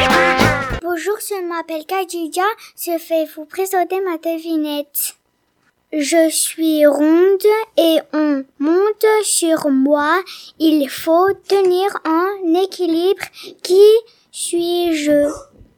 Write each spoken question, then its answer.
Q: Qui suis-je?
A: Une boule.